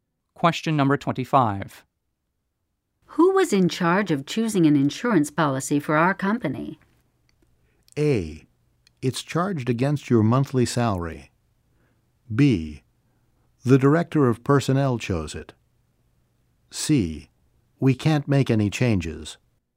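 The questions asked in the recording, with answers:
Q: Who was in charge of choosing an insurance policy for our company?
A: B: The director of personnel chose it.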